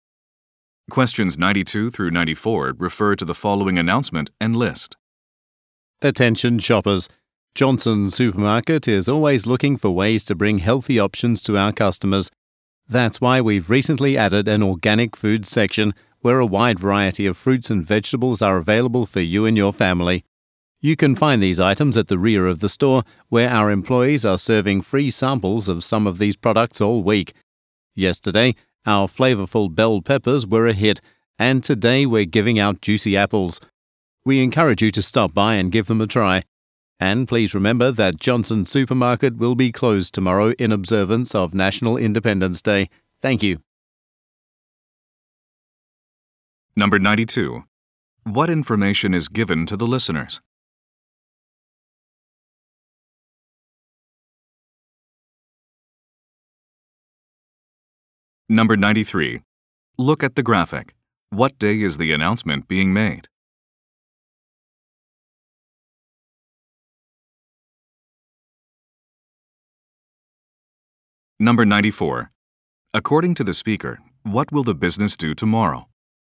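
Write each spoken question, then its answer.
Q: What information is given to the listeners?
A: A new organic food section has been added

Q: According to the speaker, what will the business do tomorrow?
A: Close for National Independence Day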